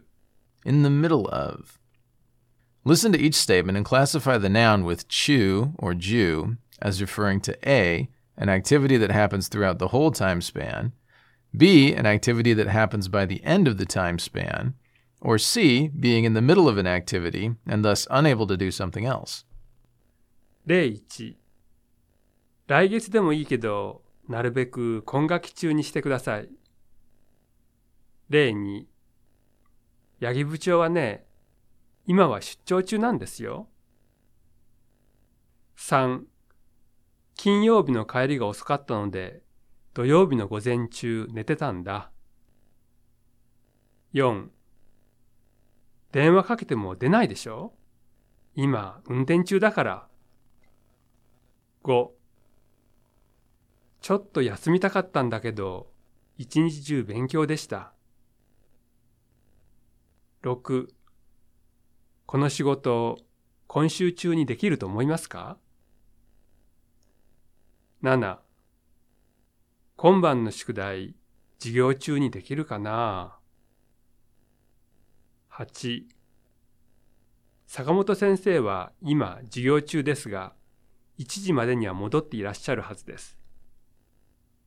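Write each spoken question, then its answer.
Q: 金曜日の帰りが遅かったので、土曜日の午前中寝てたんだ。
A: A: an activity that happens throughout the whole time span

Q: 電話かけても出ないでしょ?今、運転中だから。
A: C: being in the middle of an activity and thus unable to do something else

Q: ちょっと休みたかったんだけど、一日中勉強でした。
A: A: an activity that happens throughout the whole time span

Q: この仕事、今週中にできると思いますか?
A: B: an activity that happens by the end of the time span

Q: 坂本先生は今、授業中ですが、1時までには戻っていらっしゃるはずです。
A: C: being in the middle of an activity and thus unable to do something else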